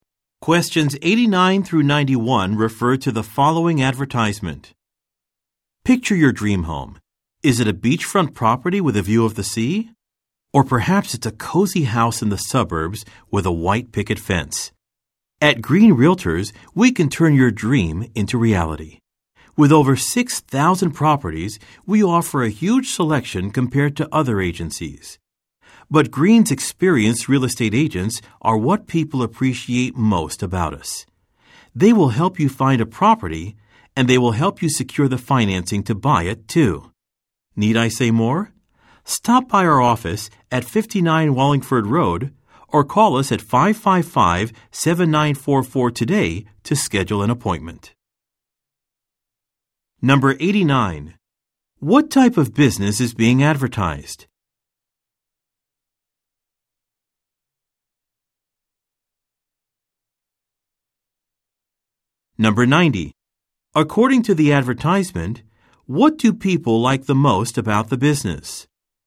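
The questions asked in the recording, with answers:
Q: What type of business is being advertised?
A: A real estate agency

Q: According to the advertisement, what do people like the most about the business?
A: Its experienced real estate agents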